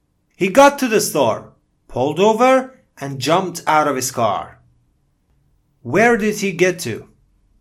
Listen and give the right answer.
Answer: The store, right?